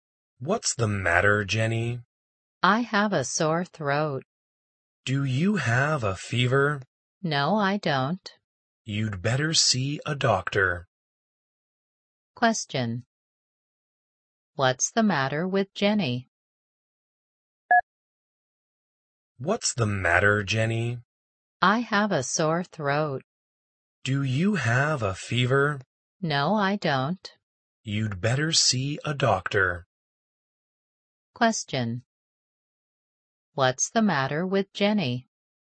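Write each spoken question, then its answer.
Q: What's the matter with Jenny?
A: She has a sore throat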